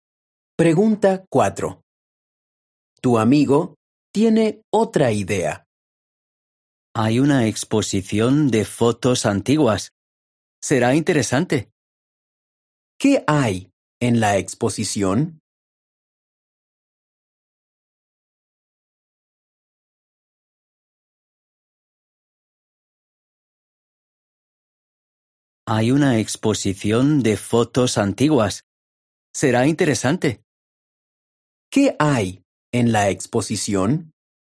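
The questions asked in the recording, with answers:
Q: ¿Qué hay en la exposición?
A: Fotos antiguas.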